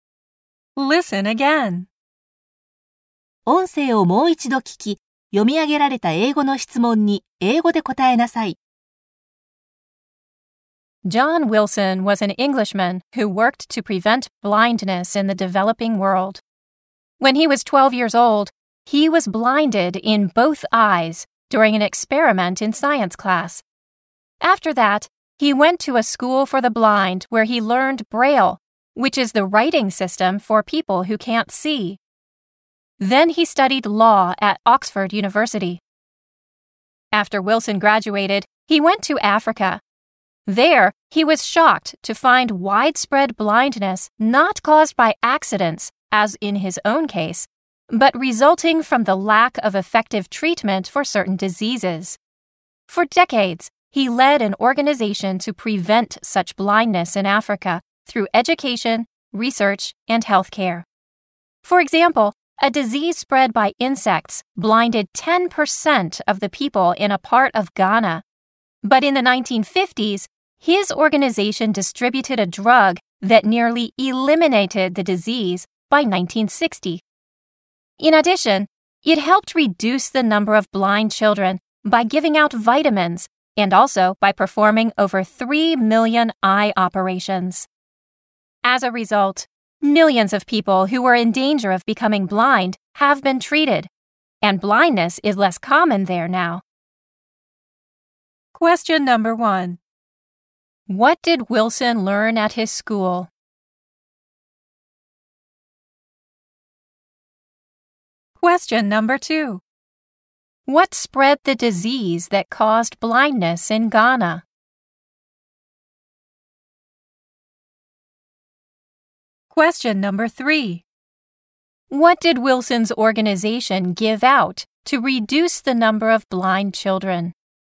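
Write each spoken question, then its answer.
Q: What did Wilson learn at his school?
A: Braille

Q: What spread the disease that caused blindness in Ghana?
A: Insects

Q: What did Wilson's organization give out to reduce the number of blind children?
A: Vitamins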